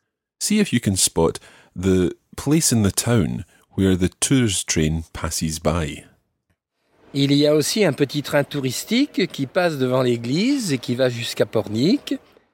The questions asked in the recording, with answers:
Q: See if you can spot the place in the town where the tourist train passes by.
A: So it passes devant l'église, in front of the church.